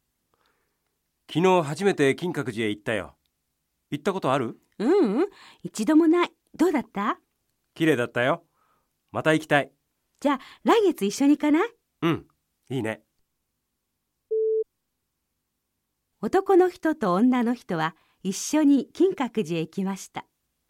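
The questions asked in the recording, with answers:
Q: 男の人と女の人は一緒に金閣寺へ行きました。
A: 正しくない(いいえ)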